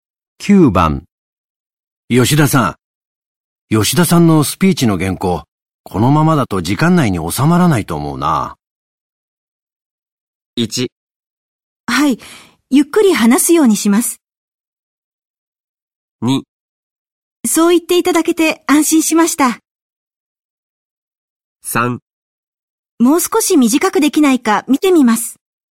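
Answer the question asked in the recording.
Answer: 3: もう少し短くできないか見てみます。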